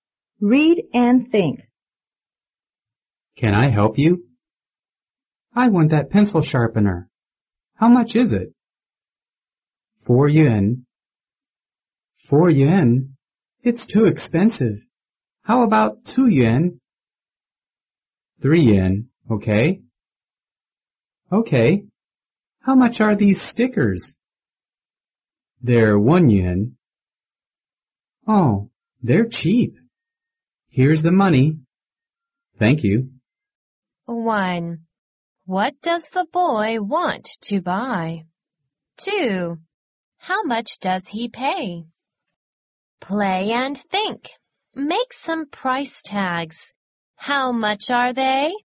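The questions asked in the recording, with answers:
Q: What does the boy want to buy?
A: A pencil sharpener (and stickers)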